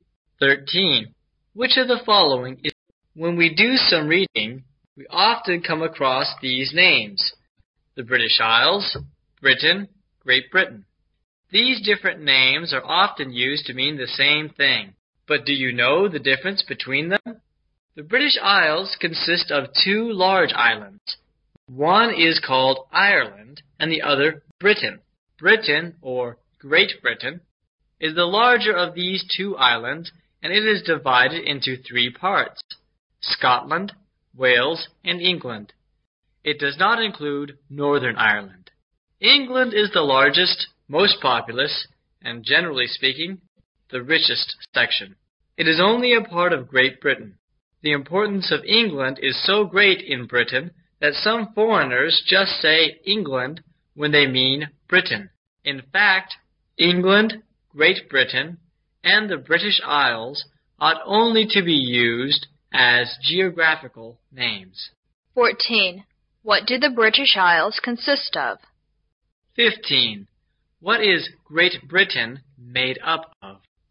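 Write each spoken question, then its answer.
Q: What do the British Isles consist of?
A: Two large islands, Ireland and Britain

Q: What is Great Britain made up of?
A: Scotland, Wales and England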